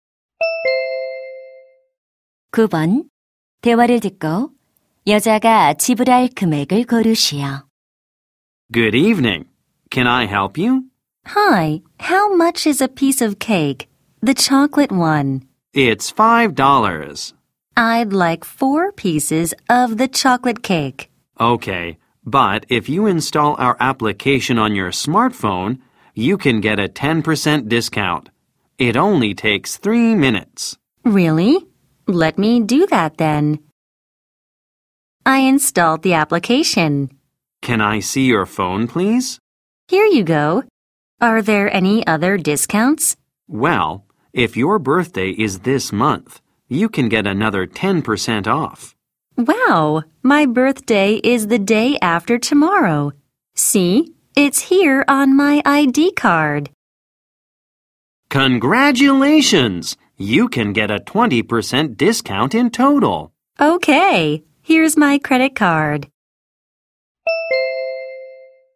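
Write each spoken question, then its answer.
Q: 여자가 지불할 금액을 고르시오.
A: $16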